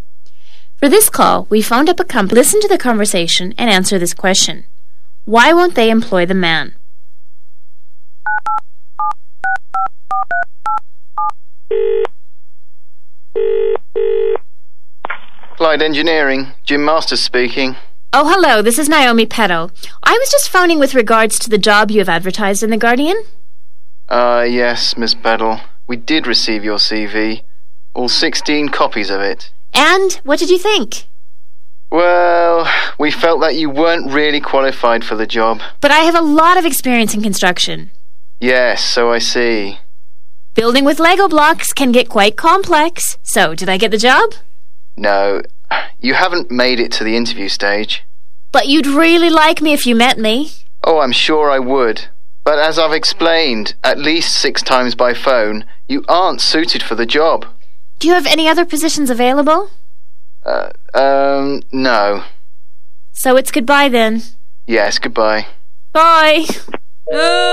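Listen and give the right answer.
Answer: He isn't qualified for the job; his only construction experience is building with Lego blocks.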